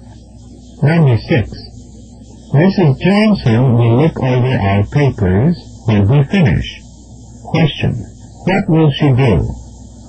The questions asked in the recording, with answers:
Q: What will she do?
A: Examine them when we're done.